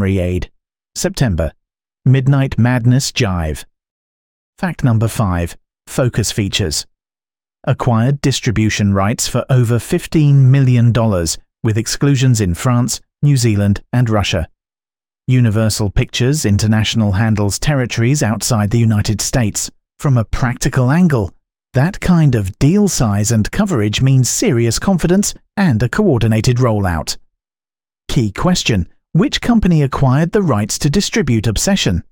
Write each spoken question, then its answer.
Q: which company acquired the rights to distribute Obsession?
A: Focus Features.